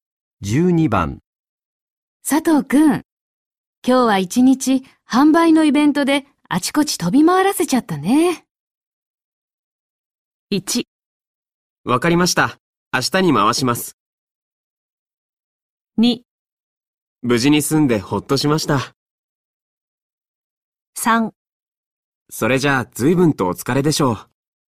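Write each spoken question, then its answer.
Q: 佐藤くん、今日は一日販売のイベントであちこち飛び回らせちゃったね。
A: 3: それじゃあ随分とお疲れでしょう。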